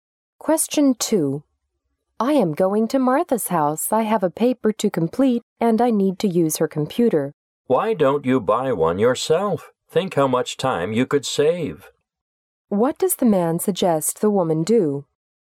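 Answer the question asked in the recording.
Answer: Buy a computer of her own.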